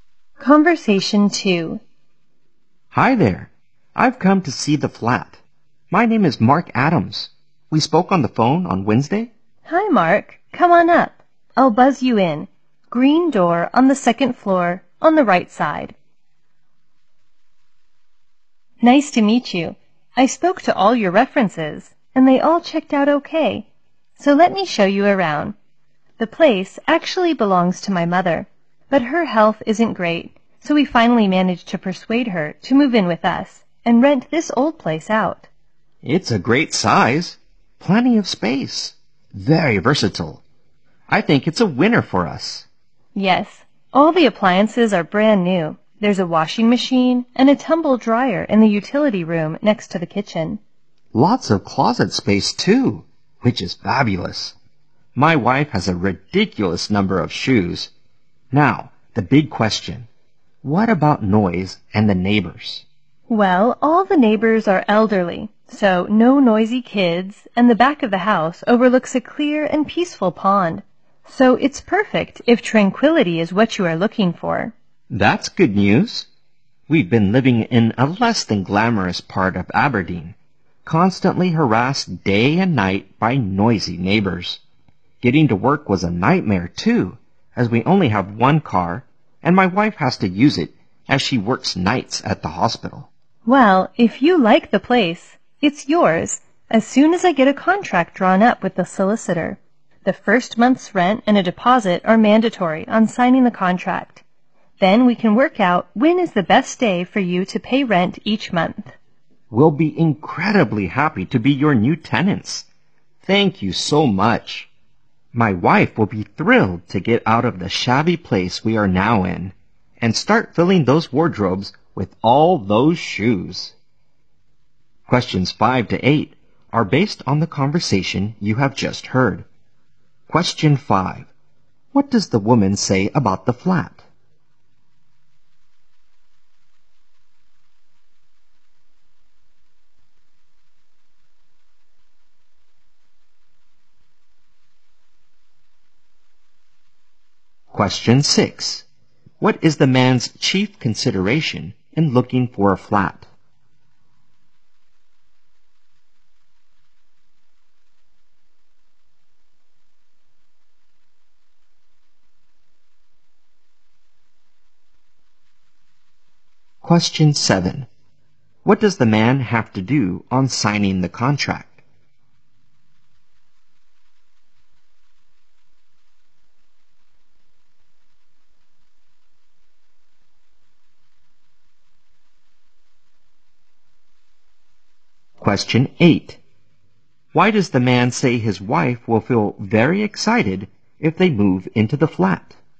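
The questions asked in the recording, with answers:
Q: What is the man's chief consideration in looking for a flat?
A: Noise and the neighbors.

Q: What does the man have to do on signing the contract?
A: Pay the first month's rent and a deposit.

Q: Why does the man say his wife will feel very excited if they move into the flat?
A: She can leave their shabby place and fill the wardrobes with her shoes.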